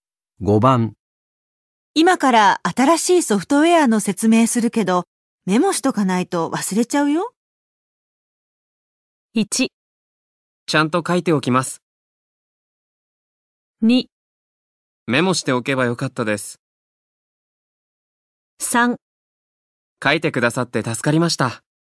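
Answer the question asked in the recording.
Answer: 1: ちゃんと書いておきます。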